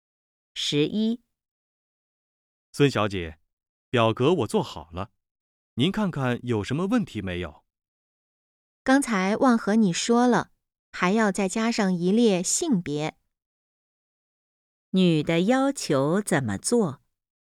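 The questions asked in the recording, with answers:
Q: 女的要求怎么做?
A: 在表格里加上一列性别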